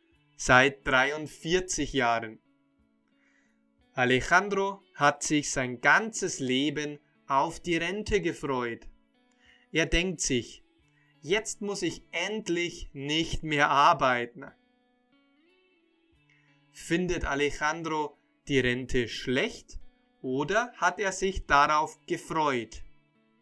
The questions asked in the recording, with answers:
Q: Findet Alejandro die Rente schlecht oder hat er sich darauf gefreut?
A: Er hat sich sein ganzes Leben auf die Rente gefreut.